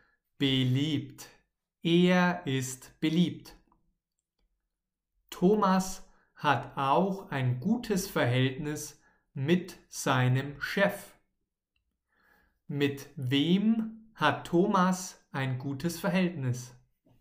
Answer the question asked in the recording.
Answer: Mit seinem Chef. Er hat ein gutes Verhältnis mit seinem Chef.